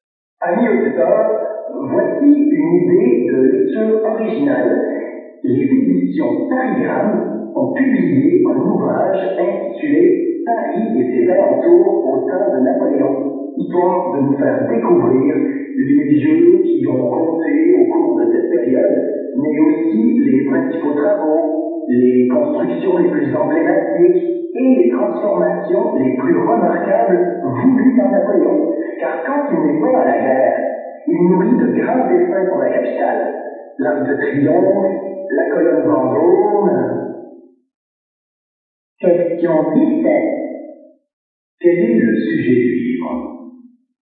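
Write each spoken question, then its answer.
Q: Quel est le sujet du livre?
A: Paris et ses transformations au temps de Napoléon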